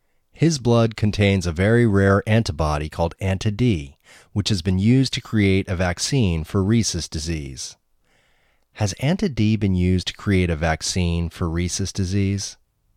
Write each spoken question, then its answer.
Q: Has Anti-D been used to create a vaccine for rhesus disease?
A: Yes, Anti-D has been used to create a vaccine for rhesus disease.